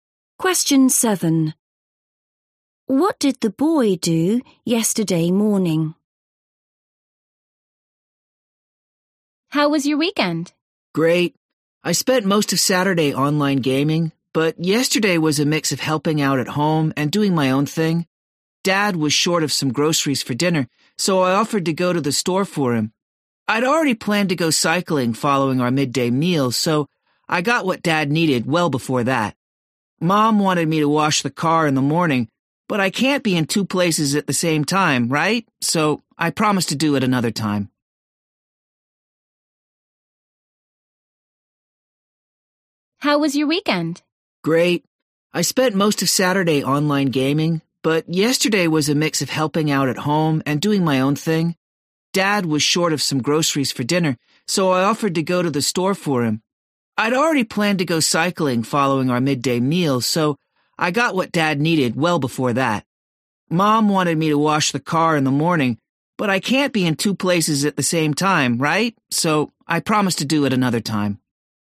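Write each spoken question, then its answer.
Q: What did the boy do yesterday morning?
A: went to the store to buy groceries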